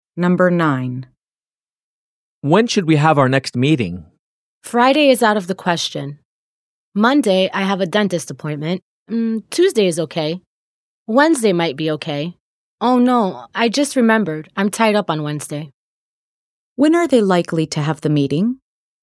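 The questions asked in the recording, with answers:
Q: When are they likely to have the meeting?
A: On Tuesday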